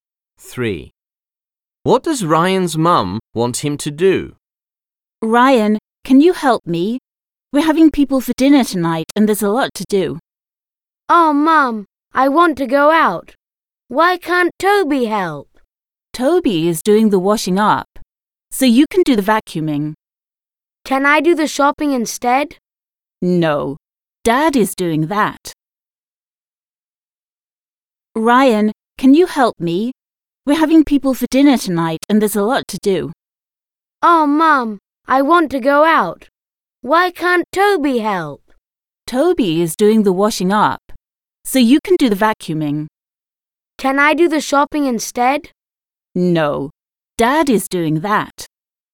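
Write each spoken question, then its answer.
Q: What does Ryan's mum want him to do?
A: the vacuuming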